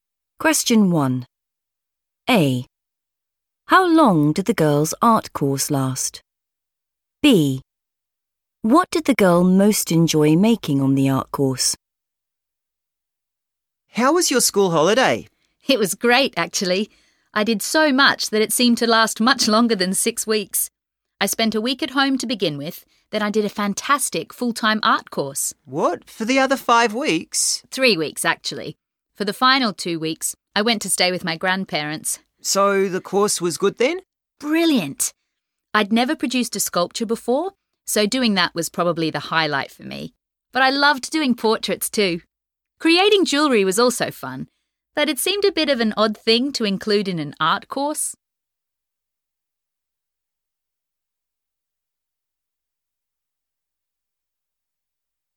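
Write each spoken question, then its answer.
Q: How long did the girls' art course last?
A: 3 weeks

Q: What did the girl most enjoy making on the art course?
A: a sculpture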